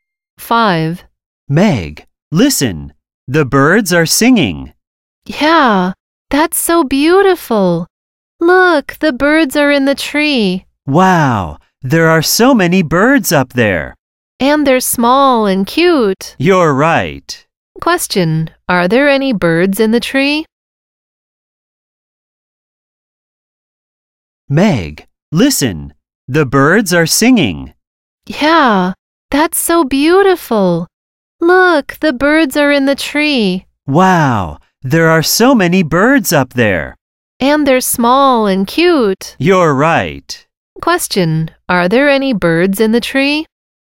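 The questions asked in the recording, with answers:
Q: are there any birds in the tree?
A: Yes, there are.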